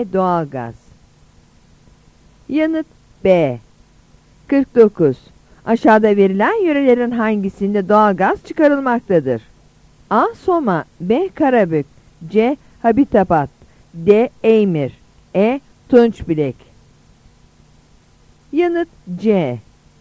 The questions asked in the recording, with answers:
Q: Aşağıda verilen yörelerin hangisinde doğalgaz çıkarılmaktadır?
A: Yanıt C.